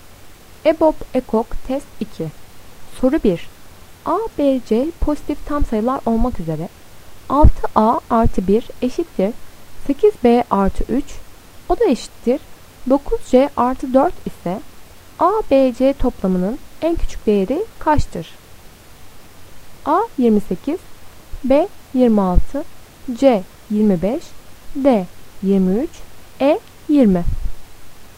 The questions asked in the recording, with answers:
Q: A, B, C pozitif tam sayılar olmak üzere 6A artı 1 eşittir 8B artı 3, o da eşittir 9C artı 4 ise A, B, C toplamının en küçük değeri kaçtır?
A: Doğru cevap B 26.